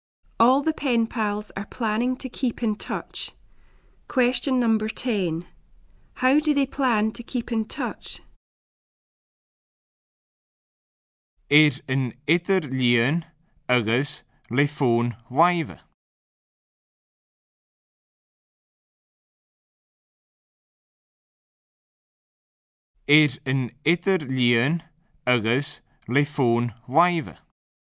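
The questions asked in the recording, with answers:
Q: How do they plan to keep in touch?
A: By internet and mobile phone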